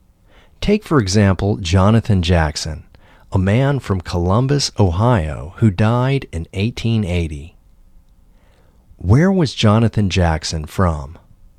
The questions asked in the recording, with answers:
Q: Where was Jonathan Jackson from?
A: Jonathan Jackson was from Columbus, Ohio.